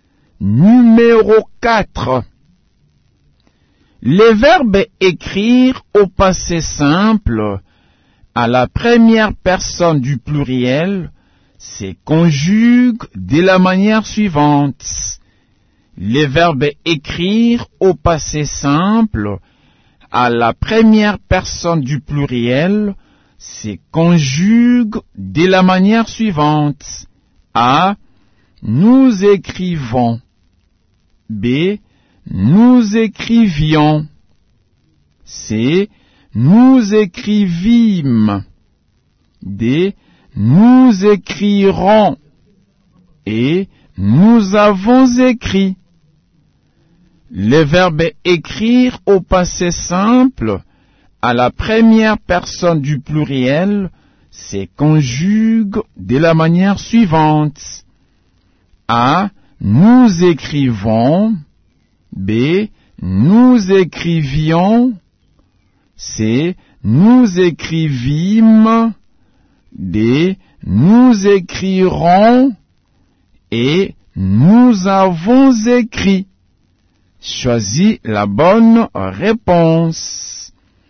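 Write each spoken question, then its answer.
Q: Les verbes écrire au passé simple à la première personne du pluriel se conjugue de la manière suivante.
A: C: Nous écrivîmes.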